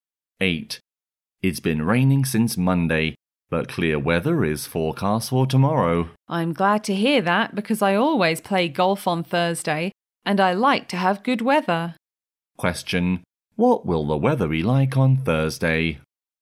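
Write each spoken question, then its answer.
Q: What will the weather be like on Thursday?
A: Clear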